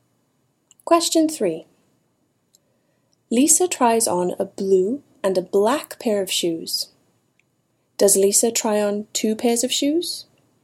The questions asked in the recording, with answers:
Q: Does Lisa try on two pairs of shoes?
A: Yes. Lisa tries on two pairs of shoes.